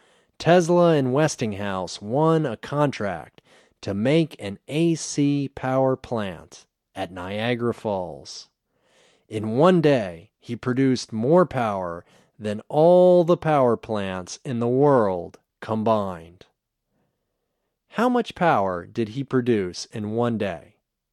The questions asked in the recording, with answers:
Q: How much power did he produce in one day?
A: He produced more power than all the power plants in the world combined.